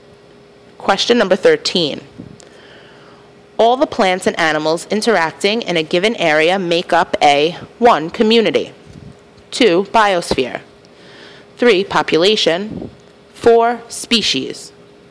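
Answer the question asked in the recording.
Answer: 1: Community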